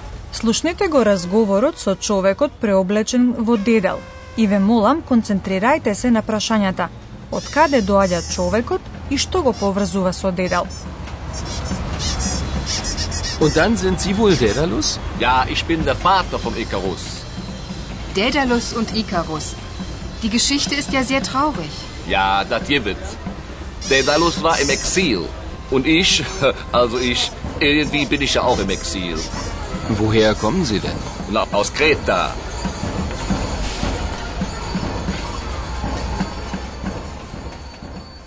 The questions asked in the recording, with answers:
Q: од каде доаѓа човекот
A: Оттаму доаѓа човекот, барем тој така вели, а на Крит исто така бил и дедал.